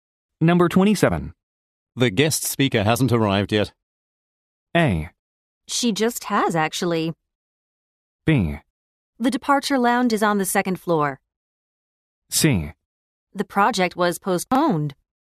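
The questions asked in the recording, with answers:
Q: The guest speaker hasn't arrived yet.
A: A: She just has, actually.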